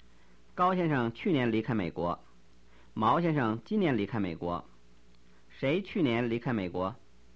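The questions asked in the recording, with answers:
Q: 谁去年离开美国?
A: 高先生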